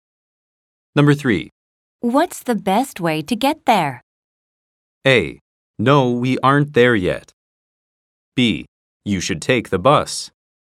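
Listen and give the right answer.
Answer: B: You should take the bus.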